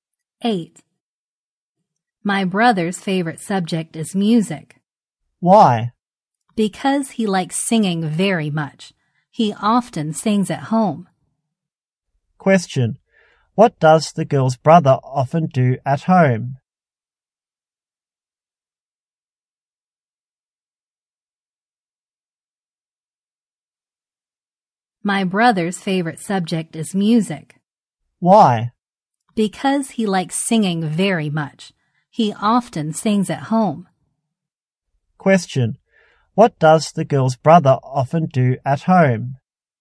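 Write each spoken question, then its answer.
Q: Question. What does the girl's brother often do at home?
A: He sings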